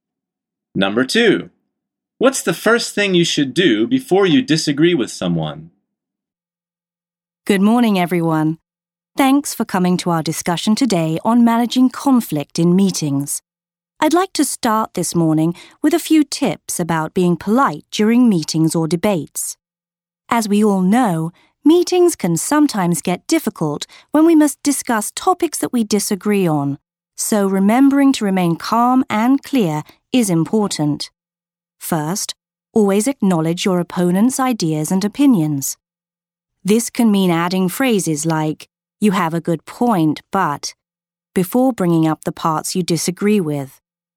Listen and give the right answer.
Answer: The answer is acknowledge their ideas and opinions.